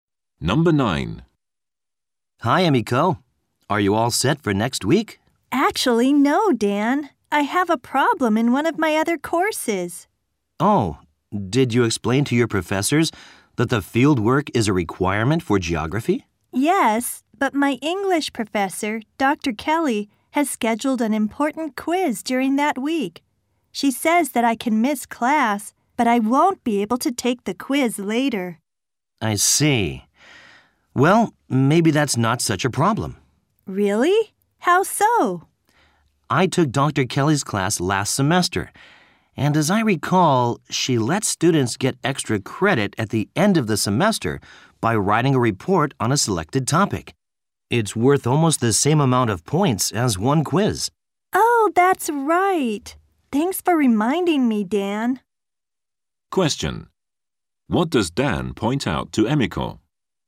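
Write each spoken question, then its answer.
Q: What does Dan point out to Emiko?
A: Dr. Kelly lets students earn extra credit with a report worth about one quiz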